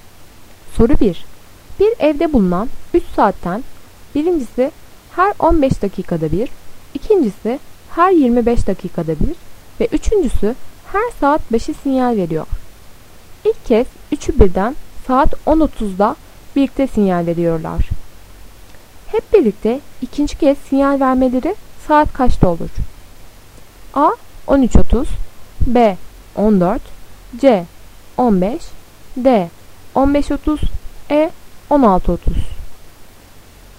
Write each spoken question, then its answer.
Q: Hep birlikte ikinci kez sinyal vermeleri saat kaçta olur?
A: Doğru cevap D. 15.30.